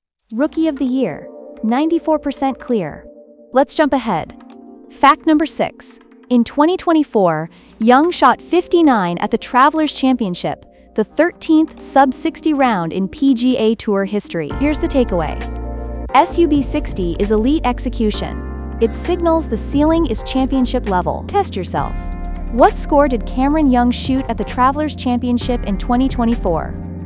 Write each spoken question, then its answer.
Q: What score did Cameron Young shoot at the Travelers Championship in 2024?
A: Correct answer, 59.